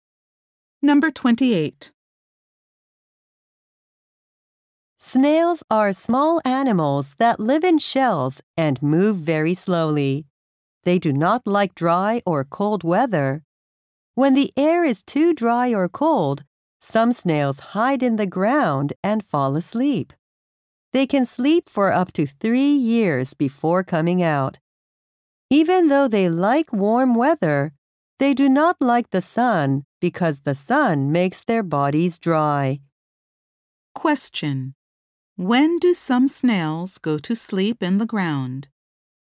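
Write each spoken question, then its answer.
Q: When do some snails go to sleep in the ground?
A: When the air is too dry or cold.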